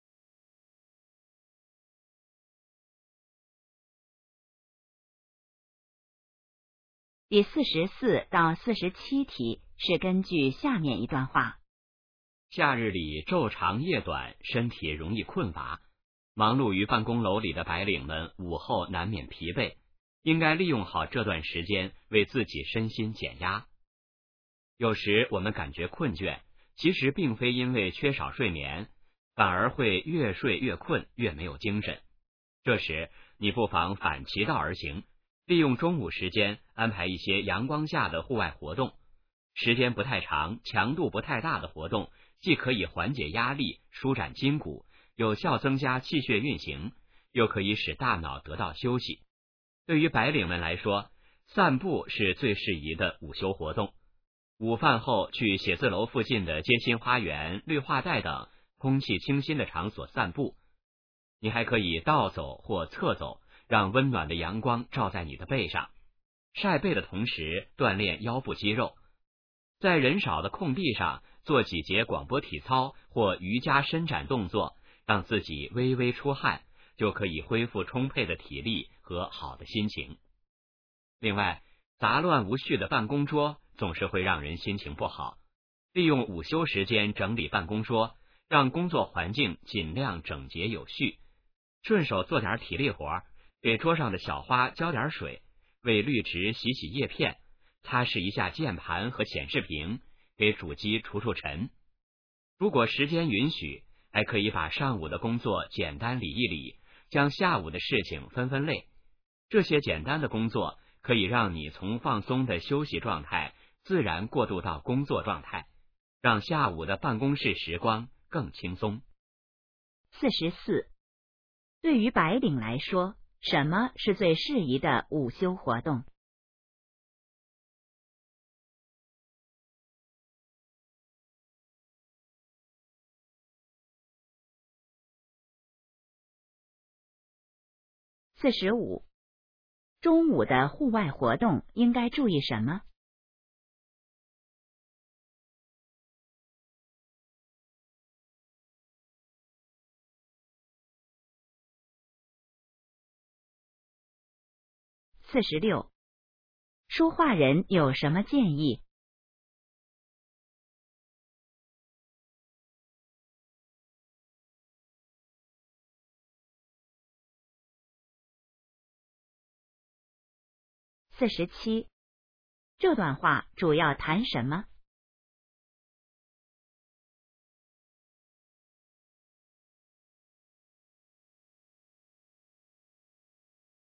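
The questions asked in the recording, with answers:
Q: 对于白领来说,什么是最适宜的午休活动?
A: 散步

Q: 中午的户外活动应该注意什么?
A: 时间不太长、强度不太大

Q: 说话人有什么建议?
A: 利用午休时间整理办公桌

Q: 这段话主要谈什么?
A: 白领如何利用午休减压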